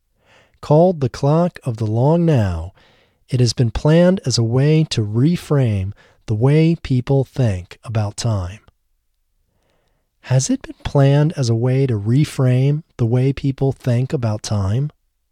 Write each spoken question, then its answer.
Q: Has it been planned as a way to reframe the way people think about time?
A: Yes, it has been planned as a way to reframe the way people think about time.